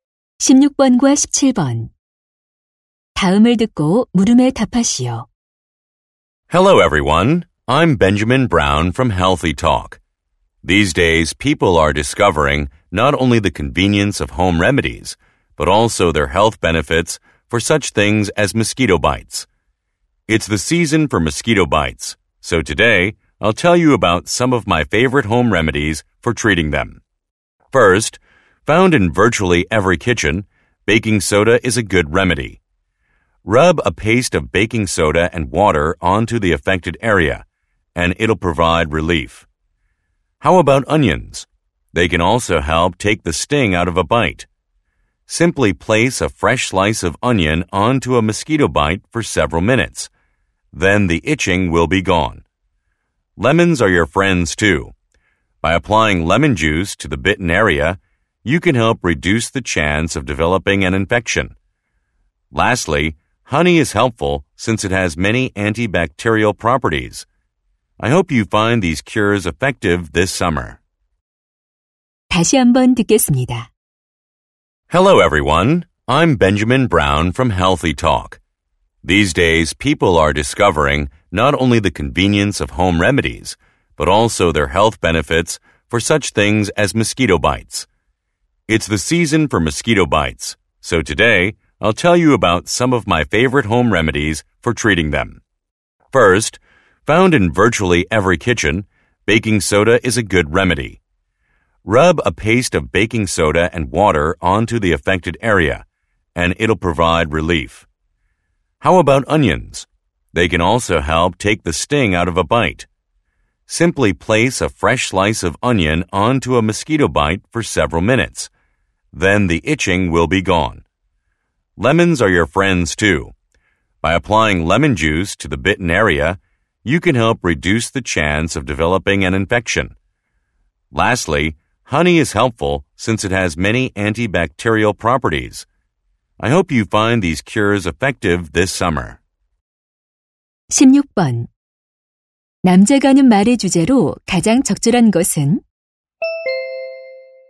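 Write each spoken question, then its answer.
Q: 남자가 하는 말의 주제로 가장 적절한 것은?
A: 모기 물린 데에 쓰는 가정 요법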